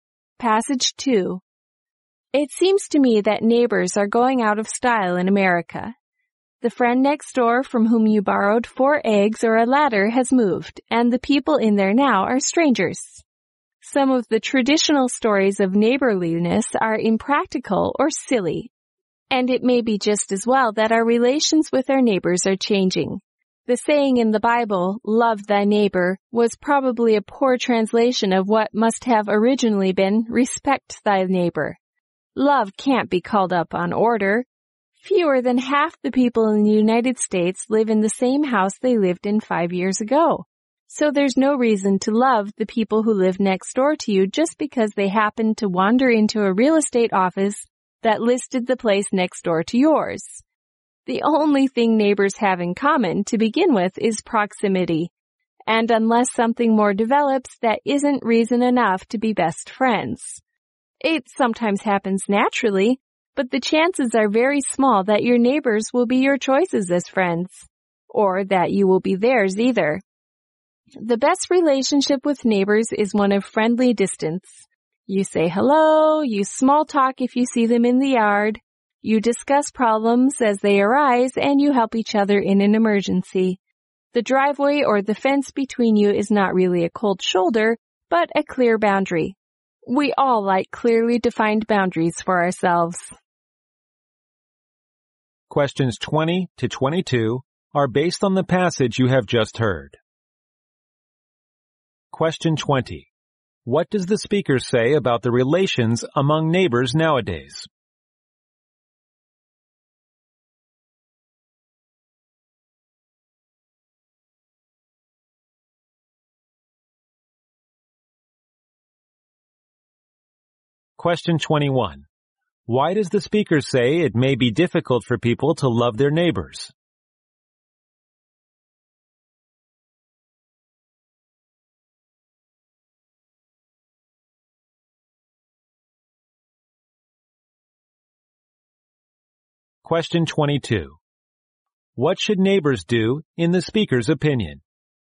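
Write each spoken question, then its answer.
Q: What does the speaker say about the relations among neighbors nowadays?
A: They are changing, and neighbors are often strangers now.

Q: Why does the speaker say it may be difficult for people to love their neighbors?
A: People move often, and neighbors have only proximity in common.

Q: What should neighbors do in the speaker's opinion?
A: Keep a friendly distance and help each other in an emergency.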